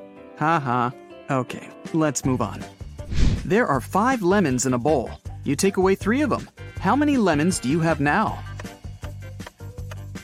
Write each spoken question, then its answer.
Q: How many lemons do you have now?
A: Well, you have the three lemons you took.